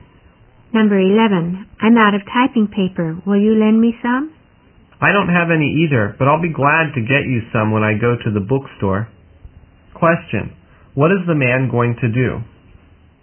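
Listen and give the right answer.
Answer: Buy typing paper for the woman at the bookstore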